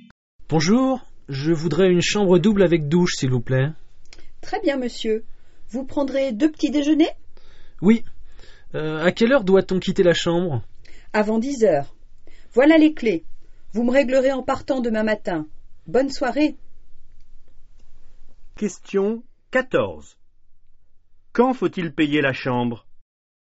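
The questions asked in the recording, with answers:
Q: Quand faut-il payer la chambre?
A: En partant, demain matin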